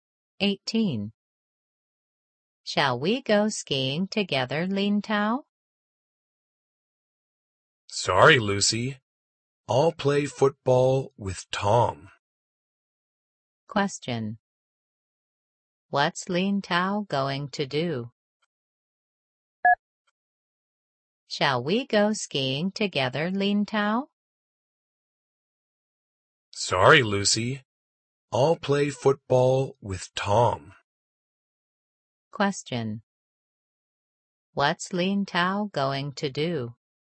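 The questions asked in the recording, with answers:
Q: What's Lin Tao going to do?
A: Play football with Tom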